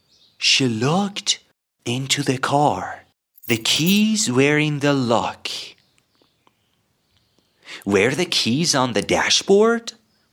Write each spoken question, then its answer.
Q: Were the keys on the dashboard?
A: No, the keys were in the lock.